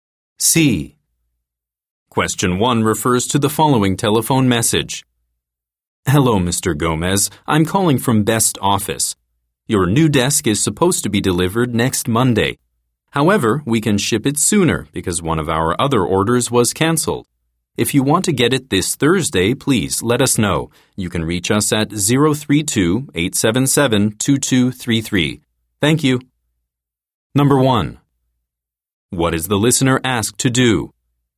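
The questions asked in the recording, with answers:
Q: What is the listener asked to do?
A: Let them know if he wants the desk delivered this Thursday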